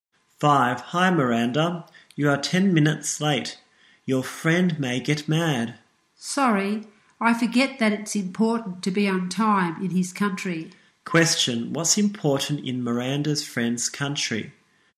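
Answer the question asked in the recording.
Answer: Being on time.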